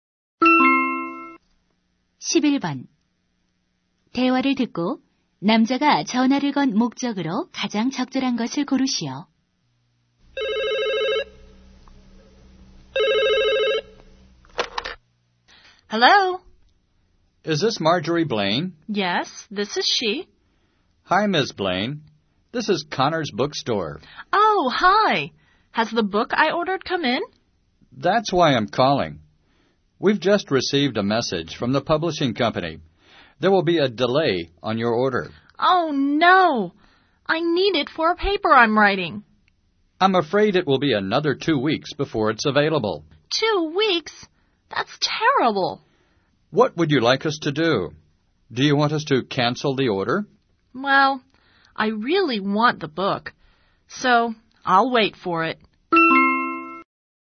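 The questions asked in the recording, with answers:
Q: 대화를 듣고 남자가 전화를 건 목적으로 가장 적절한 것을 고르시오.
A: 주문한 책의 배송이 늦어진다는 것을 알리려고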